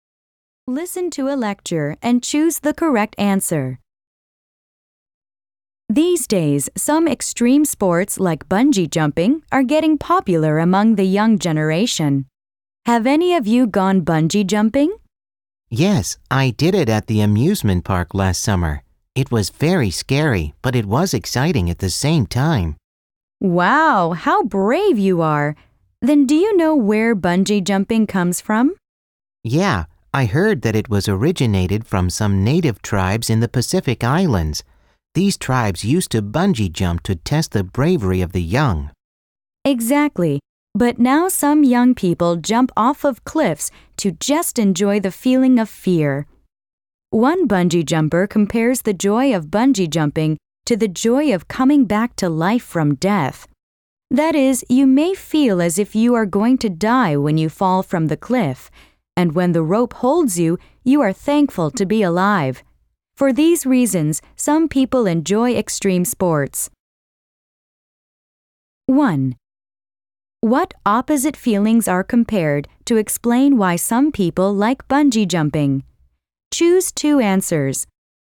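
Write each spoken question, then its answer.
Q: What opposite feelings are compared to explain why some people like bungee jumping?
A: Fear of dying and the joy of being alive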